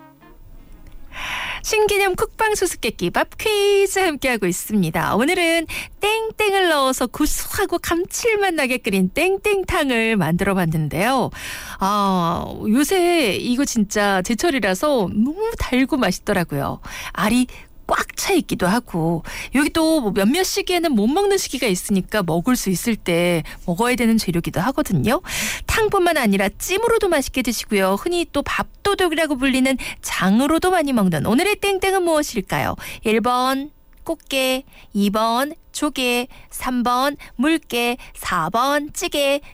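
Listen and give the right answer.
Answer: 1: 꽃게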